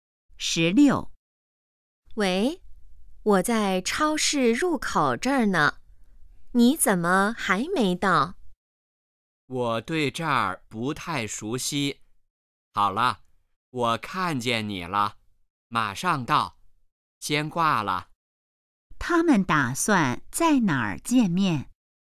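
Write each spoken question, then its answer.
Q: 他们打算在哪儿见面?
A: 超市入口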